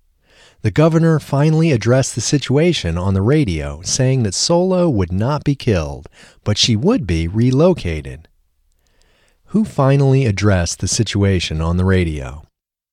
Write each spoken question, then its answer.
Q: Who finally addressed the situation on the radio?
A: The governor finally addressed the situation on the radio.